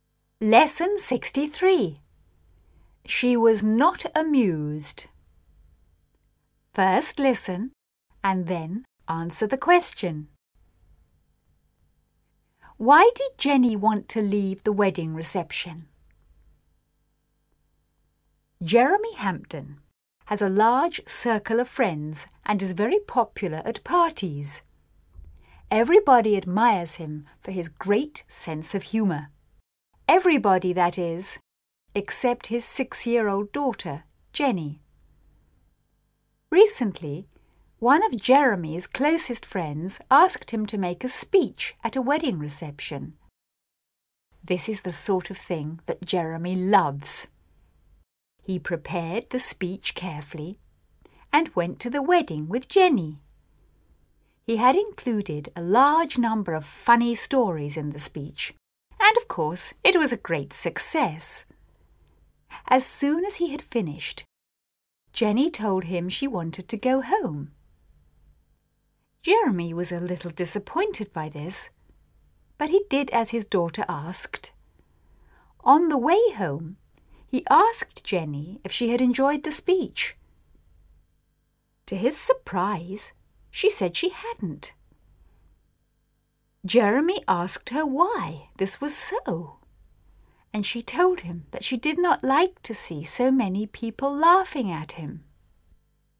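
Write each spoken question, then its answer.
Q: Why did Jenny want to leave the wedding reception?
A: She did not like to see so many people laughing at her father.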